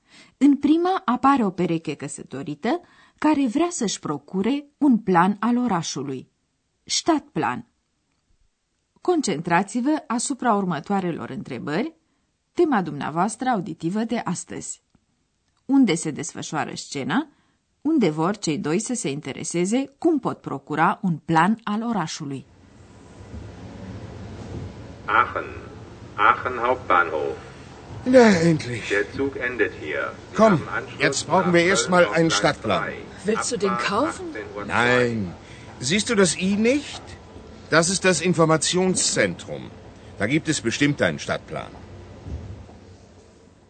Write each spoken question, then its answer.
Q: Unde se desfășoară scena unde vor cei doi să se intereseze cum pot procura un plan al orașului.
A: Scena are loc în gara centrală din Aachen.